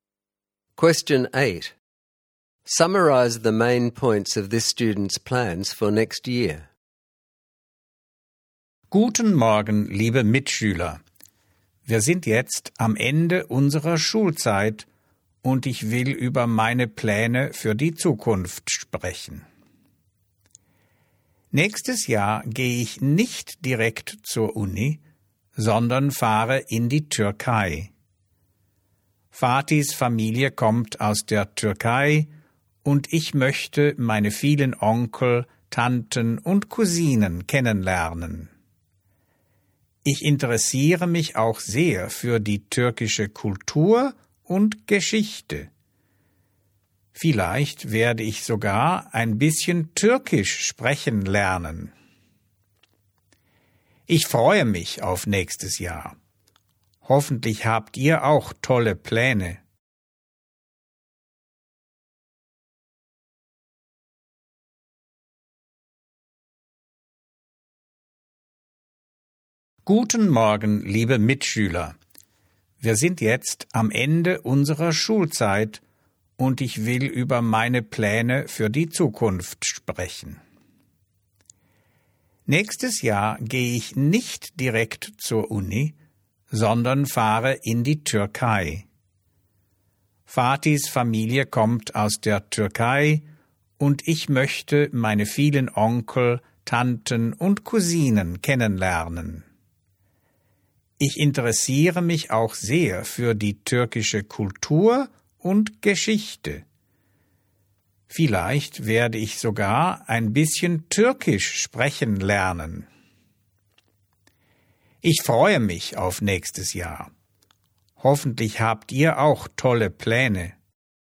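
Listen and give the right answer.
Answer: Not going straight to university; going to Turkey to meet relatives, learn about Turkish culture and history, maybe learn some Turkish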